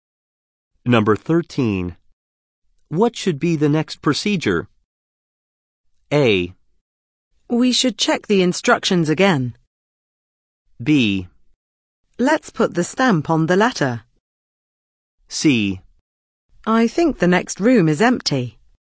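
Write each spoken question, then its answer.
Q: What should be the next procedure?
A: A: We should check the instructions again.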